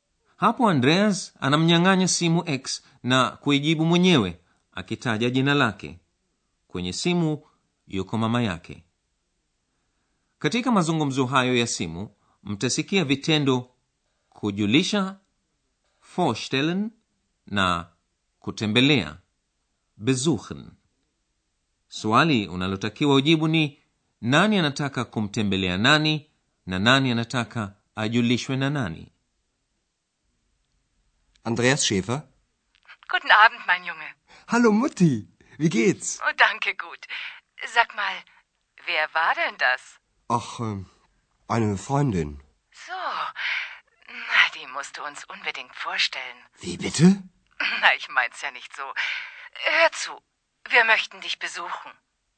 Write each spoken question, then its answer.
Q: swali unalotakiwa ujibu ni nani anataka kumtembelea nani na nani anataka ajulishwe na nani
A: Mama wa Andreas angependa kumtembelea Andreas na angependa Andreas amjulishe na X.